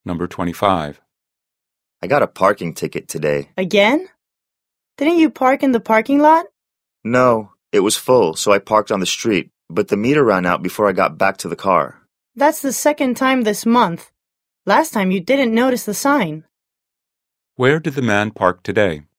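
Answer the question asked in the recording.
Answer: On the street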